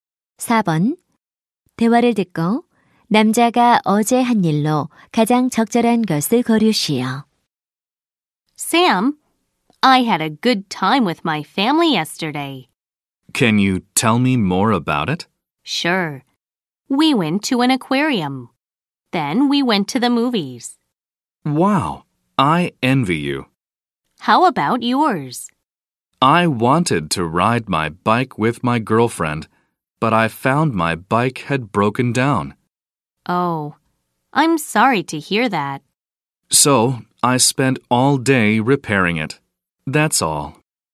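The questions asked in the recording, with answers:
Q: 대화를 듣고 남자가 어제 한 일로 가장 적절한 것을 고르시오.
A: 자전거 수리하기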